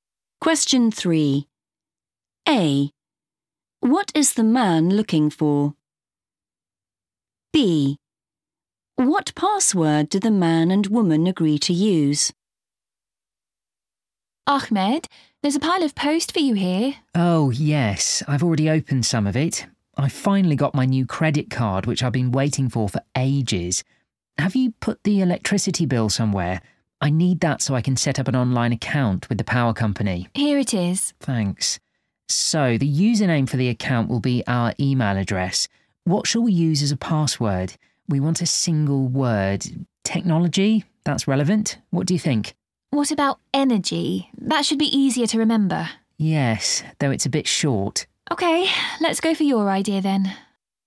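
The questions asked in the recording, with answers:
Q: What is the man looking for?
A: the electricity bill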